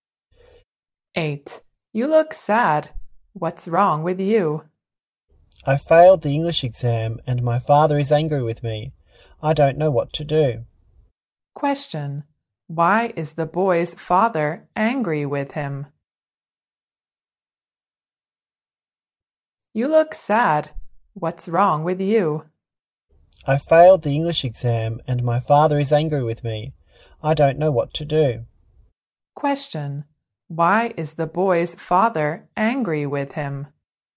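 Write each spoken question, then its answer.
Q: Why is the boy's father angry with him?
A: He failed the English exam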